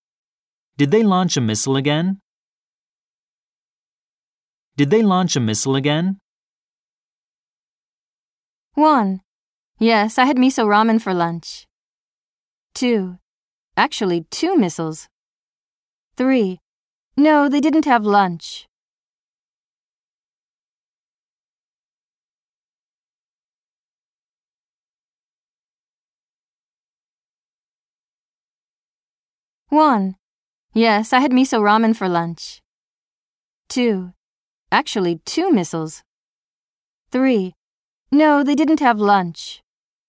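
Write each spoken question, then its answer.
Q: Did they launch a missile again?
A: 2: Actually, 2 missiles.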